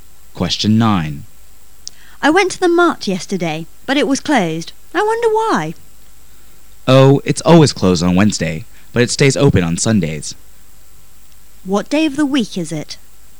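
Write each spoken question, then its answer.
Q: What day of the week is it?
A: Thursday

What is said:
[解析] W: I went to the Mart yesterday. But it was closed. I wonder why. M: Oh, it's always closed on Wednesday, but it stays open on Sundays. Q: What day of the week is it?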